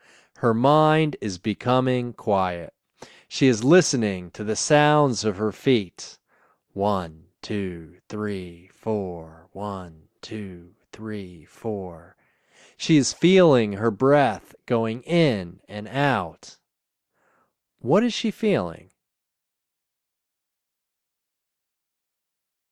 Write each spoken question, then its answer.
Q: What is she feeling?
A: She is feeling her breath going in and out.